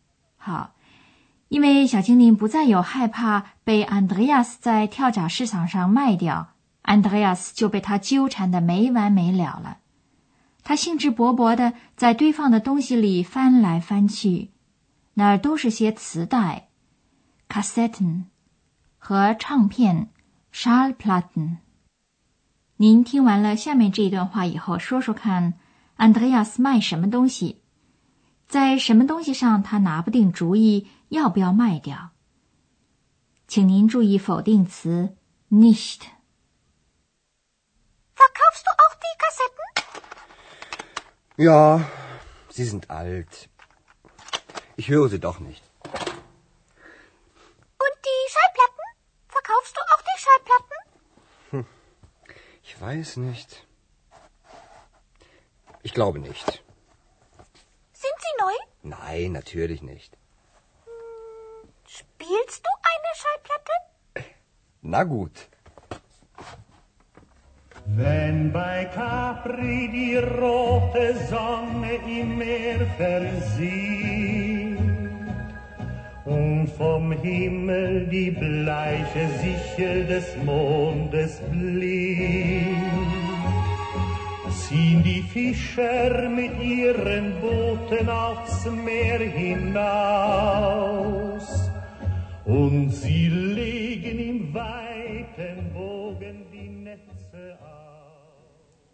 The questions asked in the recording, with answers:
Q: 您听完了下面这一段话以后,说说看 Andreas 卖什么东西,在什么东西上他拿不定主意要不要卖掉。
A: 安德烈亚斯想卖掉磁带,但是他自己还不知道是否把唱片也卖掉。